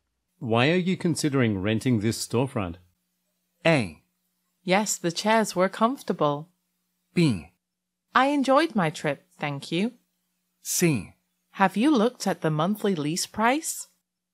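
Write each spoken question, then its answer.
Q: Why are you considering renting this storefront?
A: C: Have you looked at the monthly lease price?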